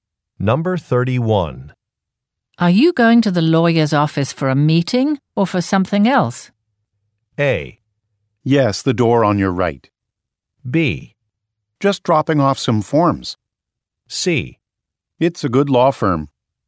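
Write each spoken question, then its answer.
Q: Are you going to the lawyer's office for a meeting or for something else?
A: B: Just dropping off some forms.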